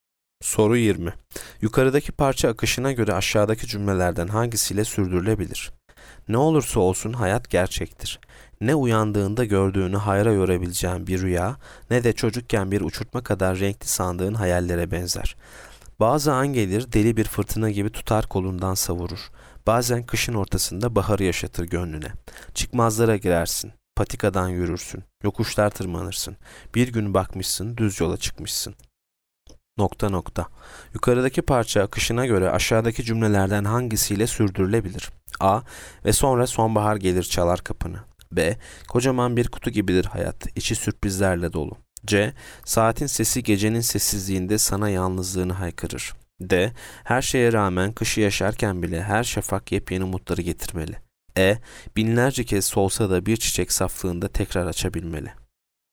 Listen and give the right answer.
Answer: Yanıt B. Kocaman bir kutu gibidir hayat, içi sürprizlerle dolu.